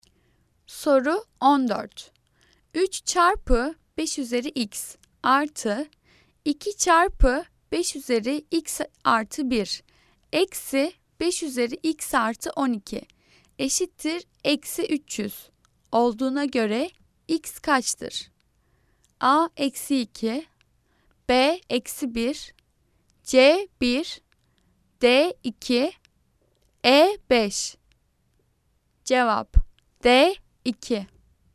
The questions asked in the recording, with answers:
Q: 3 çarpı 5 üzeri x artı 2 çarpı 5 üzeri x artı 1 eksi 5 üzeri x artı 12 eşittir eksi 300 olduğuna göre x kaçtır?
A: Cevap D 2.